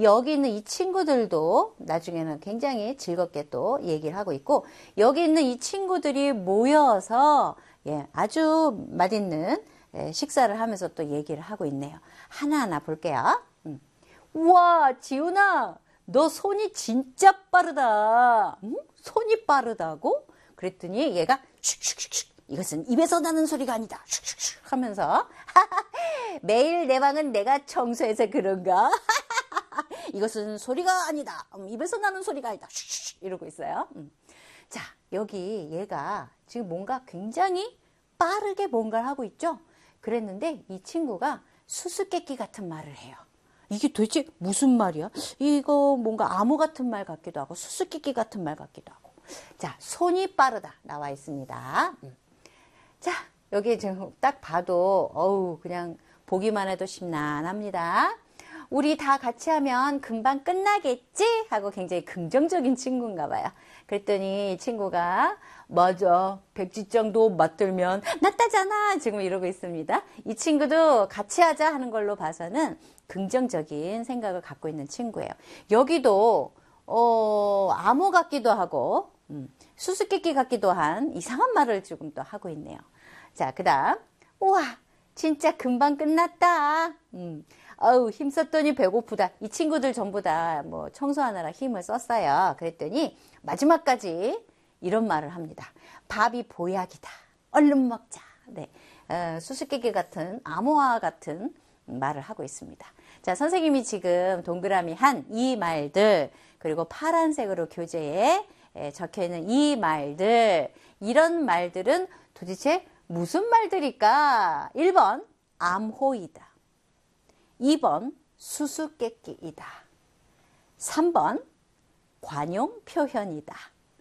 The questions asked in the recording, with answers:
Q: 자, 선생님이 지금 동그라미 한이 말들, 그리고 파란색으로 교재에 적혀 있는 이 말들, 이런 말들은 도대체 무슨 말들일까?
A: 정답은 3번 관용 표현이라는 겁니다.